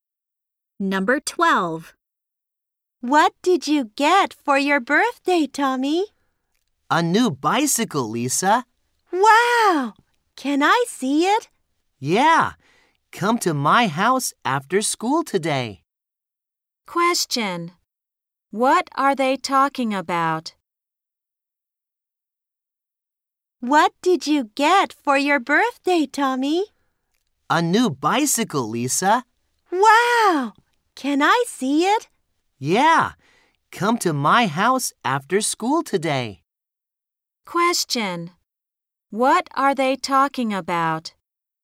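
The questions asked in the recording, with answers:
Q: What are they talking about?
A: Tommy's new bicycle (birthday present).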